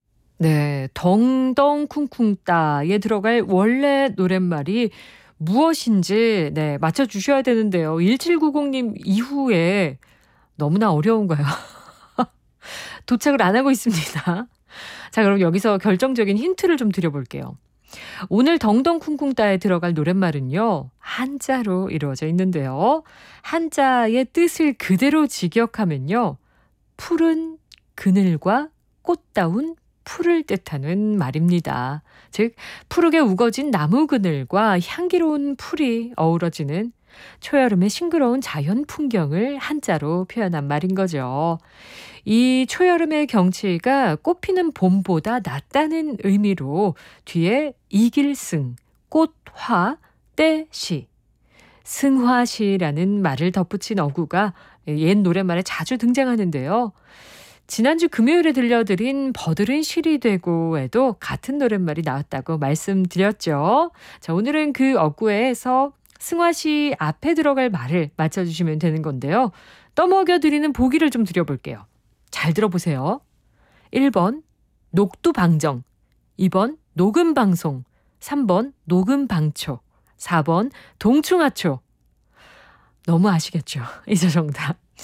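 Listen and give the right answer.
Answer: 3: 녹음방초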